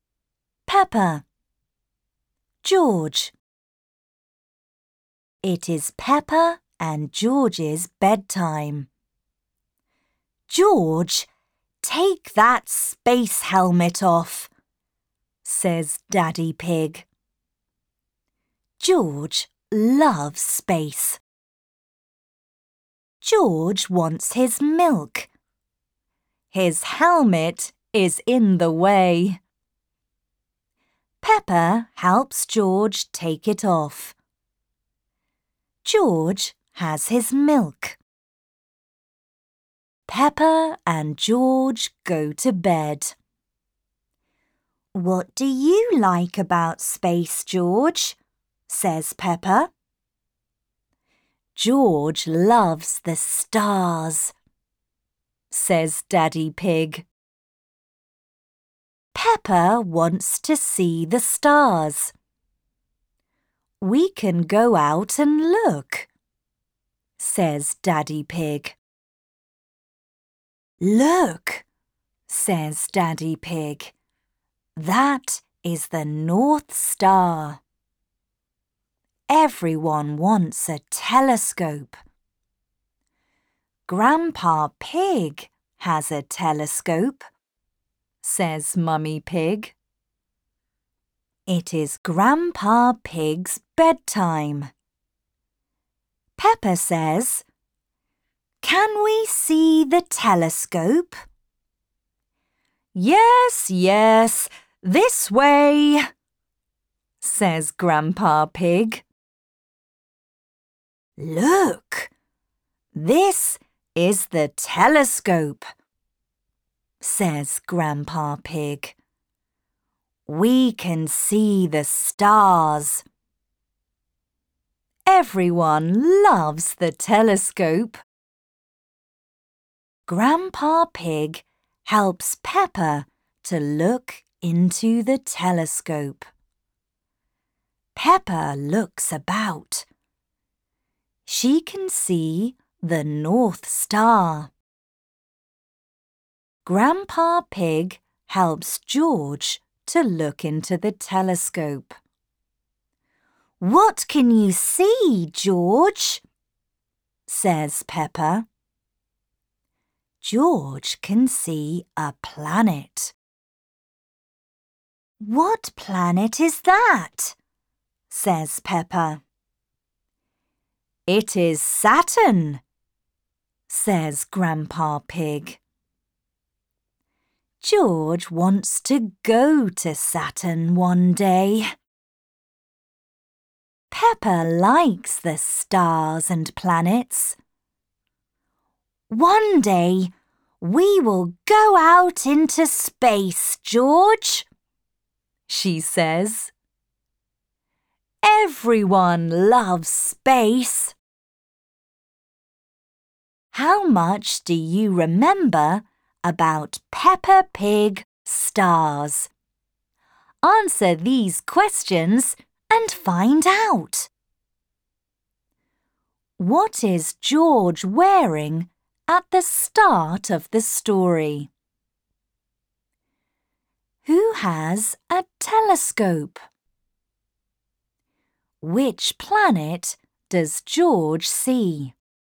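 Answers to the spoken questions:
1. A space helmet
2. Grandpa Pig
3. Saturn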